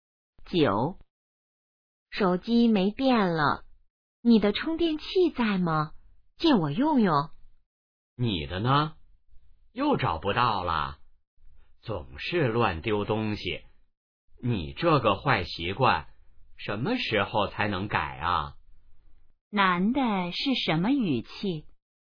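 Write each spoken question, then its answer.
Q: 男的是什么语气?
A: 责备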